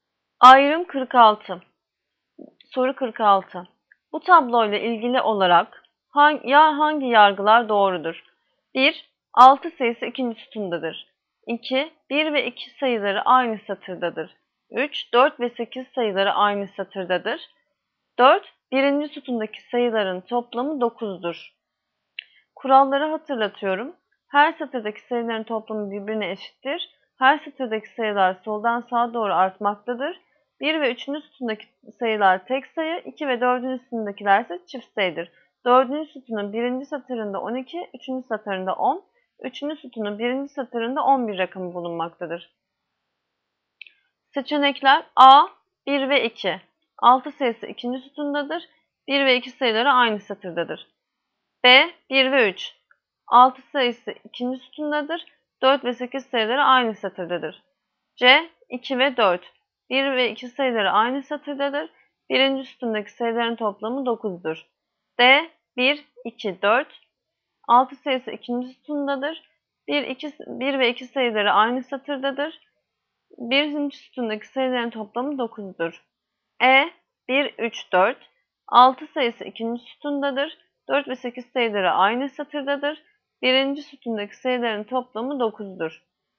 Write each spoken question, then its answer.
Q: Bu tabloyla ilgili olarak hangi yargılar doğrudur?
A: Yanıt: Diyarbakır, 1, 2, 4.